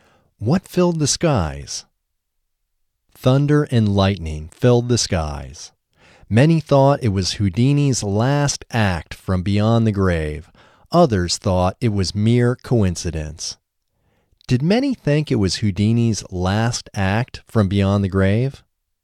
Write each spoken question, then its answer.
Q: Did many think it was Houdini's last act from beyond the grave?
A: Yes, many thought it was Houdini's last act from beyond the grave.